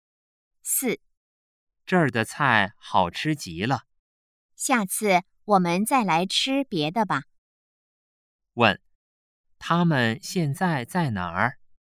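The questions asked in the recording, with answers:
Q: 问,他们现在在哪儿?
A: 饭馆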